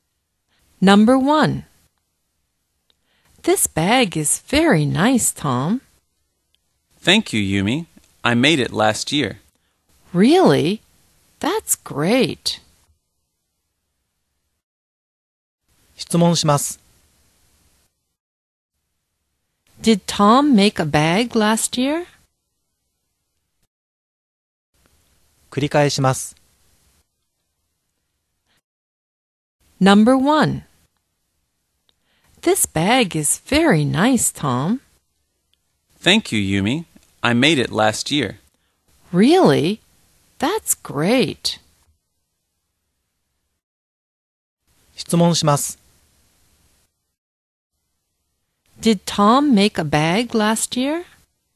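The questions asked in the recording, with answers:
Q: Did Tom make a bag last year?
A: Yes, he did.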